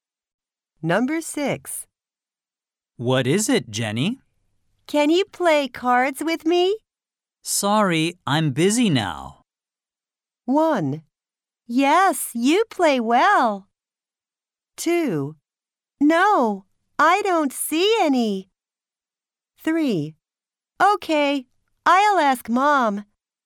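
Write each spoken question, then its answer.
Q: Sorry, I'm busy now.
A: 3: Okay, I'll ask Mom.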